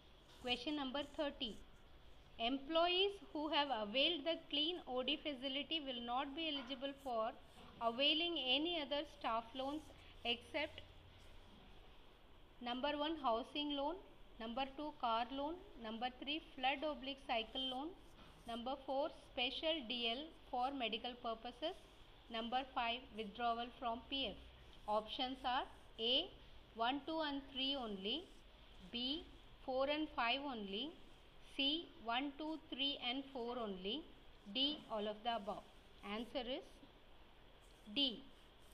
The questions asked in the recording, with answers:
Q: Employees who have availed the clean OD facility will not be eligible for availing any other staff loans except number 1 housing loan number 2 car loan number 3 flood oblique cycle loan number 4 special dl for medical purposes number 5 withdrawal from pf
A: answer is D.